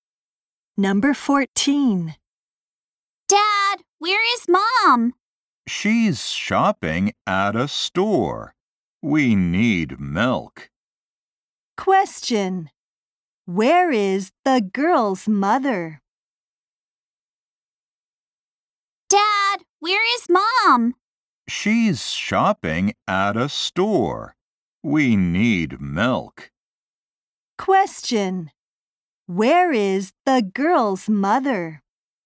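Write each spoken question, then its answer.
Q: Where is the girl's mother?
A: Shopping at a store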